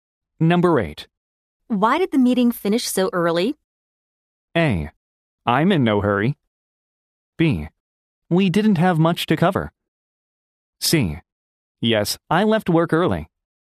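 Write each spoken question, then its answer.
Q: Why did the meeting finish so early?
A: B: We didn't have much to cover.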